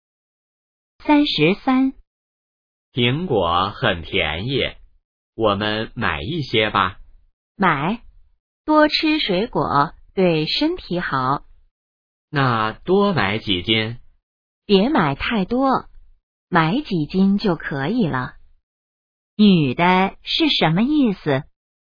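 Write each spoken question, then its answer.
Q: 女的是什么意思?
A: 别买太多,买几斤就可以了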